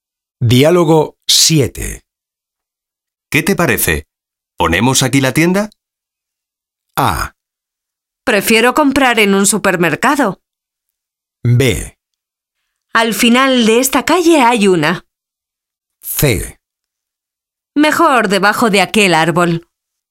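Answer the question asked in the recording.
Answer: C: Mejor debajo de aquel árbol.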